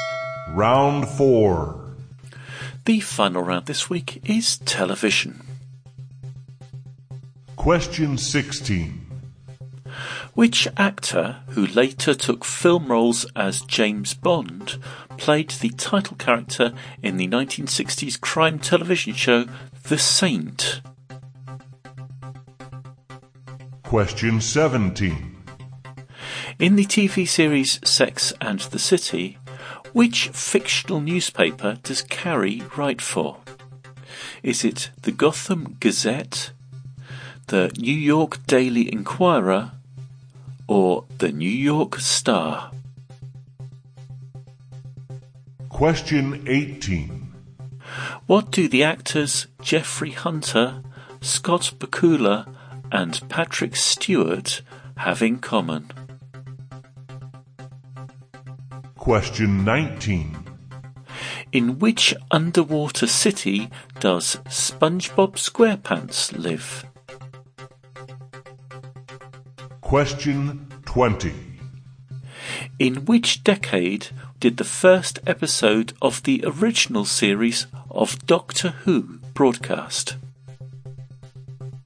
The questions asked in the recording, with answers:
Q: Which actor, who later took film roles as James Bond, played the title character in the 1960s crime television show The Saint?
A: the actor who played the saint, was Roger Moore.

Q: In the TV series Sex and the City, which fictional newspaper does Carrie write for?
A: the newspaper that Carrie wrote for in Sex and the City was the New York Star.

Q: What do the actors Jeffrey Hunter, Scott Bakula, and Patrick Stewart have in common?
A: have all played captains of the Enterprise in various iterations of the Star Trek TV show.

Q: In which underwater city does SpongeBob SquarePants live?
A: SpongeBob SquarePants lives in Bikini Bottom.

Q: In which decade did the first episode of the original series of Doctor Who broadcast?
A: Doctor Who was originally broadcast in the 1960s.